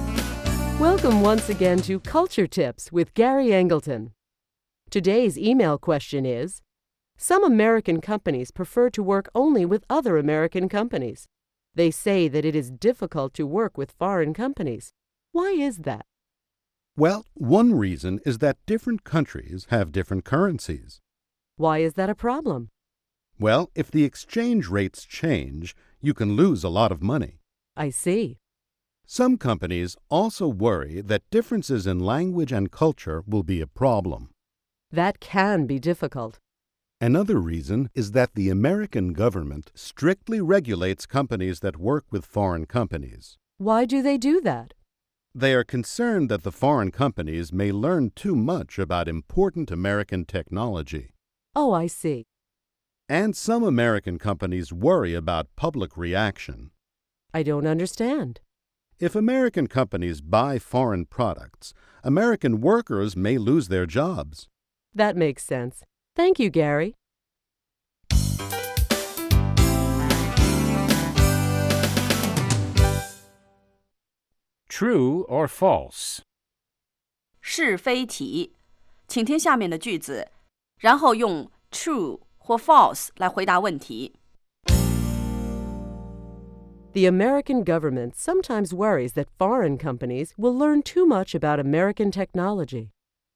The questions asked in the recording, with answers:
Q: The American government sometimes worries that foreign companies will learn too much about American technology.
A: True. That's why the American government regulates companies that do business with foreign companies.